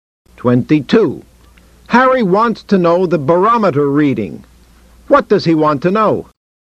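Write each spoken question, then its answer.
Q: What does he want to know?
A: The barometer reading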